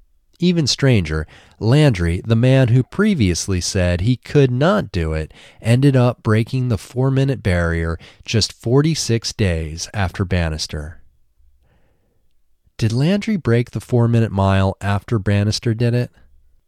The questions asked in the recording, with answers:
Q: Did Landry break the 4-minute mile after Bannister did it?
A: Yes, Landry broke the 4-minute mile just 46 days after Bannister did it.